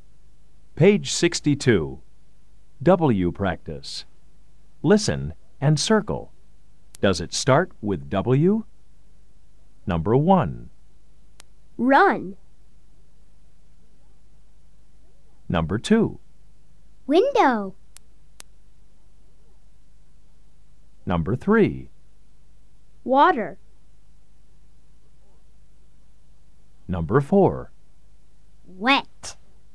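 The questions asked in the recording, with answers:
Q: Does it start with W?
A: No (run)

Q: Does it start with W?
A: Yes (window)

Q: Does it start with W?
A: Yes (water)

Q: Does it start with W?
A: Yes (wet)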